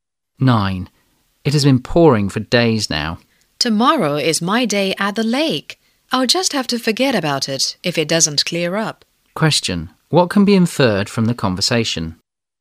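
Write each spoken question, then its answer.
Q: What can be inferred from the conversation?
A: The trip to the lake will be cancelled if the rain doesn't stop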